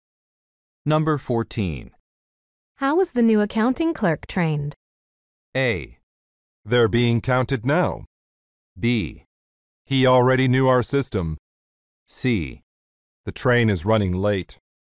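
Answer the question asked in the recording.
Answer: B: He already knew our system.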